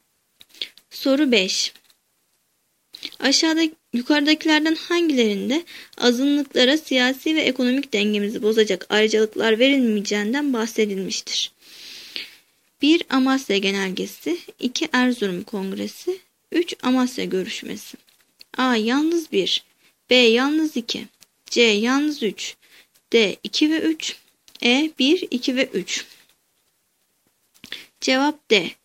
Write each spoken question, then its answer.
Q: Yukarıdakilerden hangilerinde azınlıklara siyasi ve ekonomik dengemizi bozacak ayrıcalıklar verilmeyeceğinden bahsedilmiştir?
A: Cevap D.